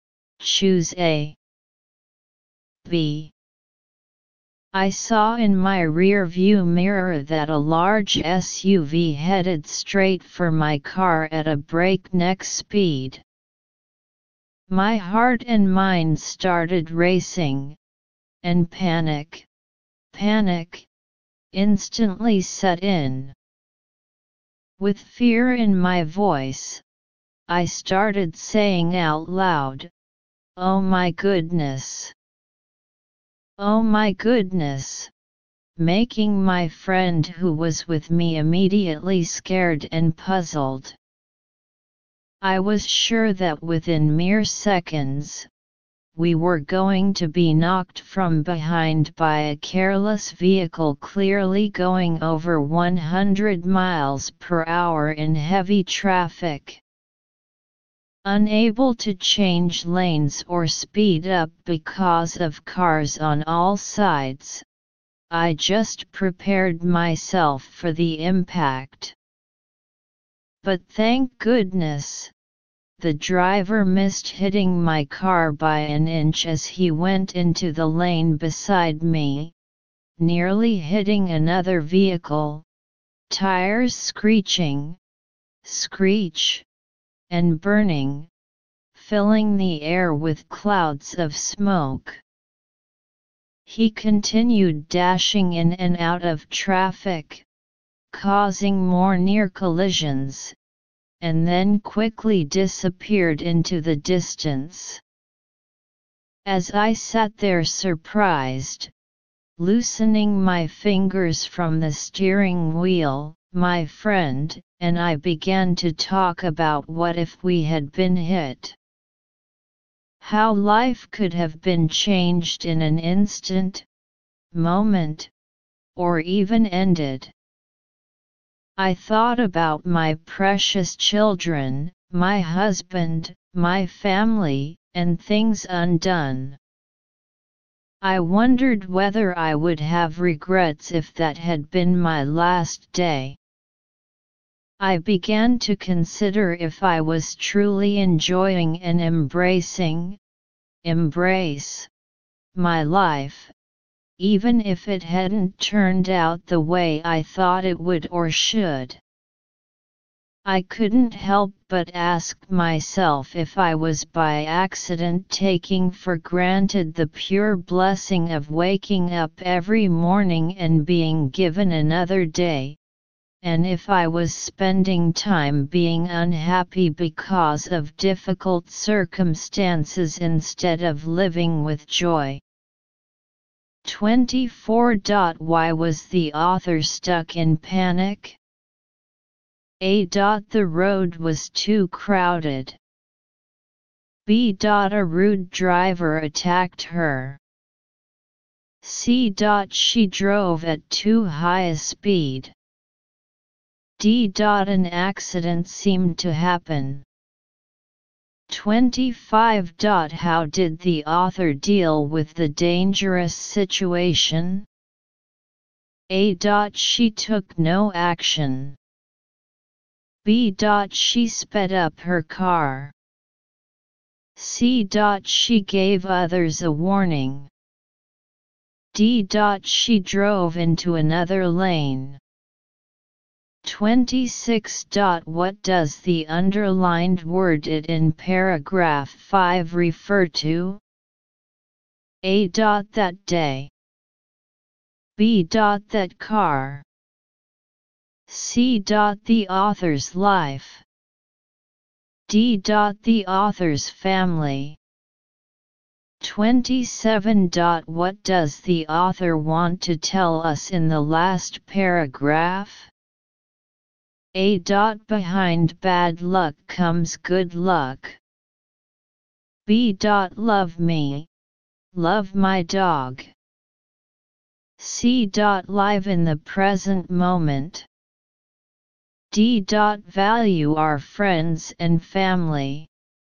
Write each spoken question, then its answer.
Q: Why was the author stuck in panic?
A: Answer 2-4. D.

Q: How did the author deal with the dangerous situation?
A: 25. A.

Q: What does the author want to tell us in the last paragraph?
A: 27. C.